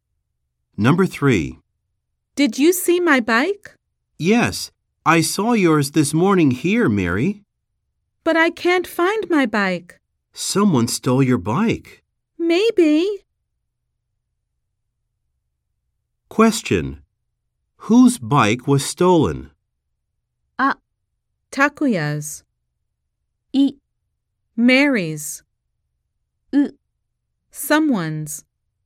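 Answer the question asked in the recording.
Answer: I: Mary's.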